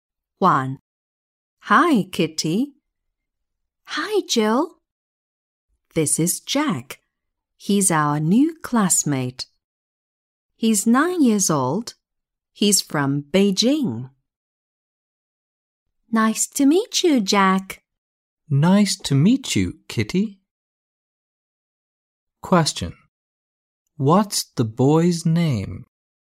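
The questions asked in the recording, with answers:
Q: What's the boy's name?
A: Jack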